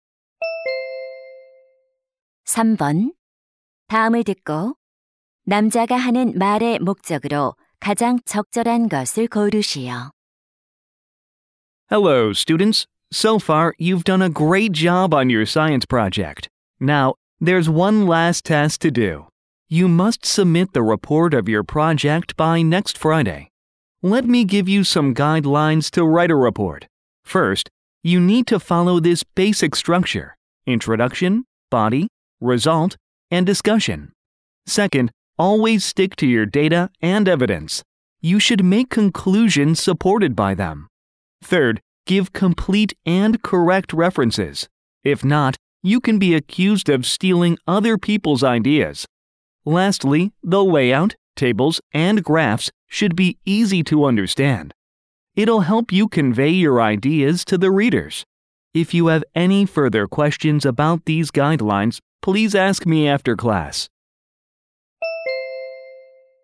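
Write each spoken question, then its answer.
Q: 다음을 듣고 남자가 하는 말의 목적으로 가장 적절한 것을 고르시오.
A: 과학 프로젝트 보고서 작성 지침을 안내하려고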